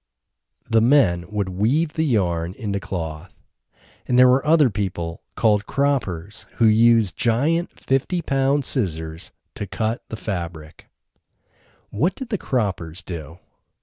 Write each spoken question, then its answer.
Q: What did the croppers do?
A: Croppers used giant 50-pound scissors to cut the fabric.